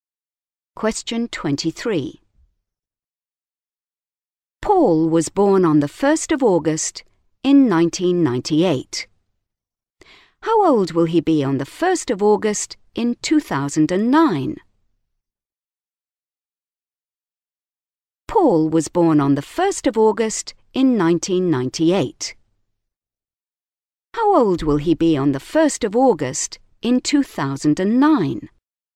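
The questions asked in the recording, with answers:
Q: How old will he be on the 1st of August in 2009?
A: 11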